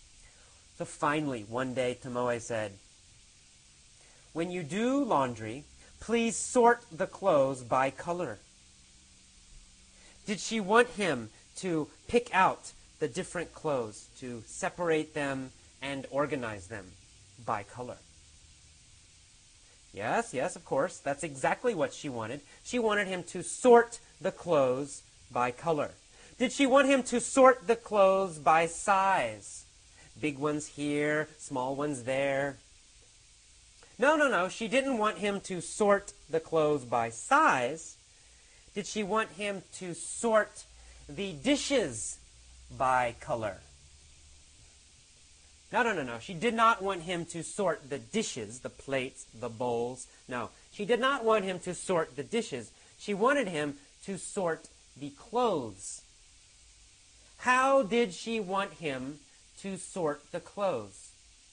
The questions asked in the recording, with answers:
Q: How did she want him to sort the clothes?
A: Well, she wanted him to sort the clothes by color.